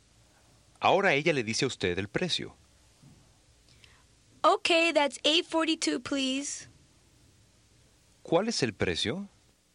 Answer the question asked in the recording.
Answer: $8.42, please.